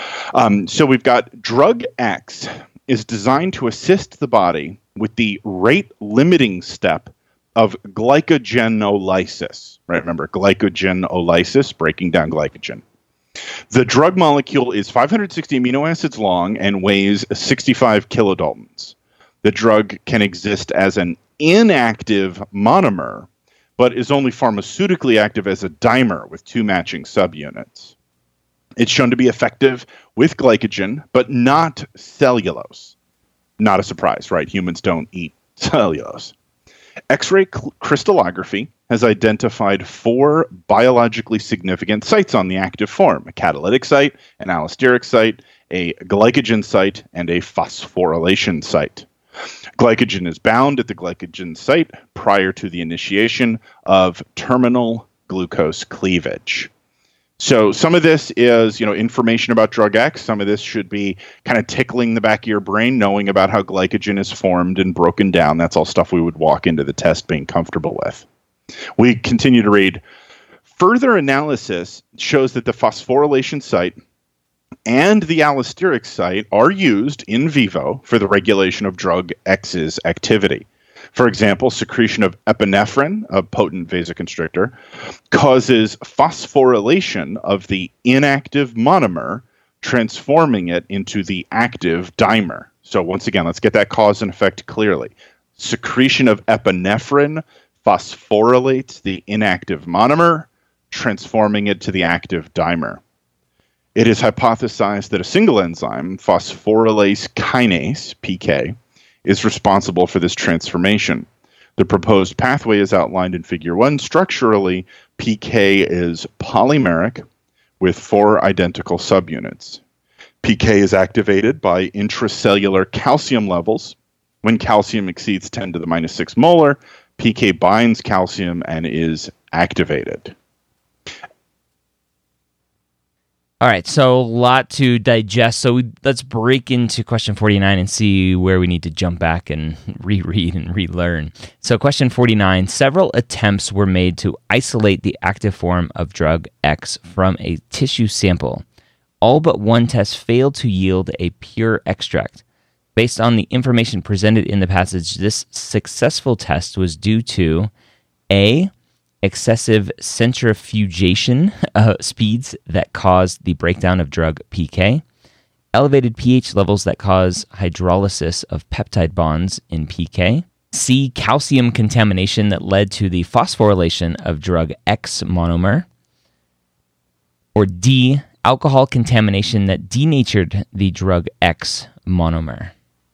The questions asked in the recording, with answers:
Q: several attempts were made to isolate the active form of drug X from a tissue sample.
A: C, calcium contamination that led to the phosphorylation of the drug X monomer.